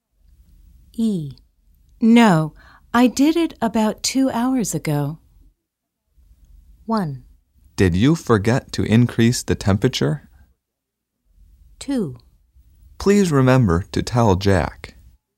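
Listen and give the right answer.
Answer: 1: Did you forget to increase the temperature?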